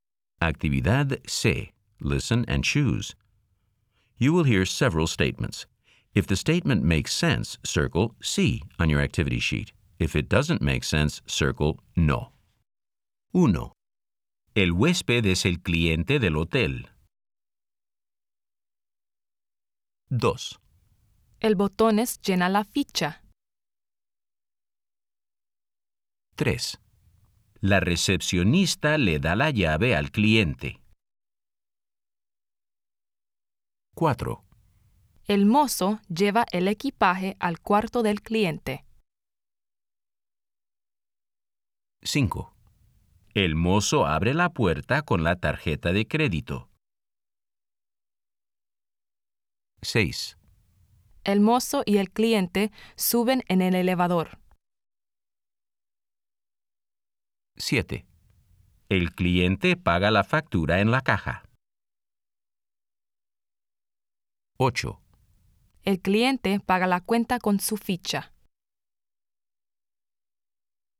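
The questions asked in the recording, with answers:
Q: El huésped es el cliente del hotel.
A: Sí

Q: El botón es llena la ficha.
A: No

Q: La recepcionista le da la llave al cliente.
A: Sí

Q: El mozo lleva el equipaje al cuarto del cliente.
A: Sí

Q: El mozo abre la puerta con la tarjeta de crédito.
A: No

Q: El mozo y el cliente suben en el elevador.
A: Sí

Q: El cliente paga la factura en la caja.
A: Sí

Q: El cliente paga la cuenta con su ficha.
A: No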